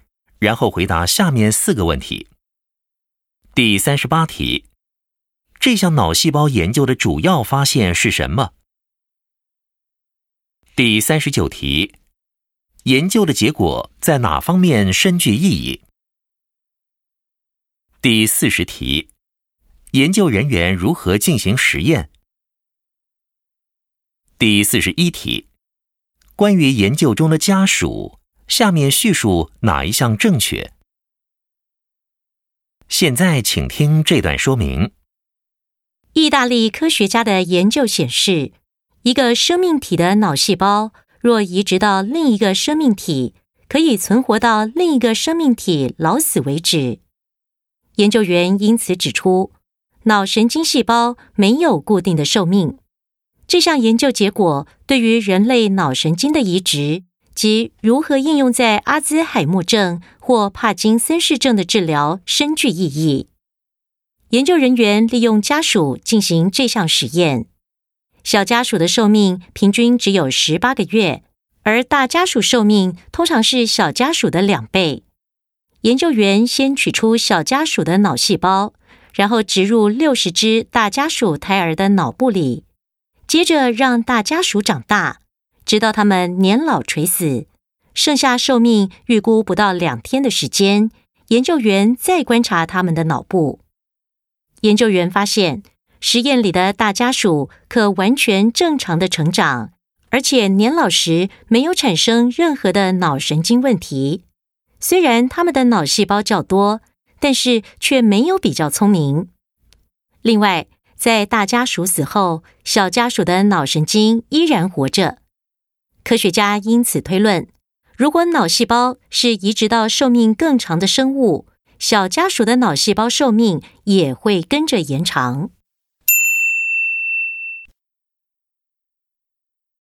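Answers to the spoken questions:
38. 脑神经细胞没有固定的寿命,移植后可以存活到另一个生命体老死为止
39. 人类脑神经移植及阿兹海默症或帕金森氏症的治疗
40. 取出小家鼠的脑细胞,植入60只大家鼠胎儿的脑部,等它们年老垂死时再观察脑部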